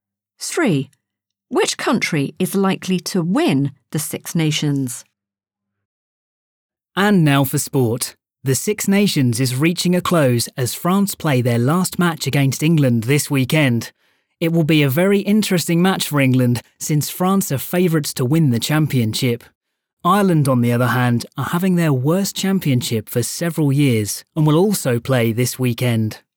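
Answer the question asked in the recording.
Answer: France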